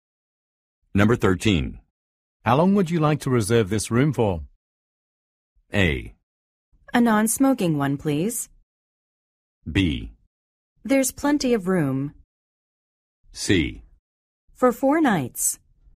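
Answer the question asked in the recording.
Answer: C: For 4 nights.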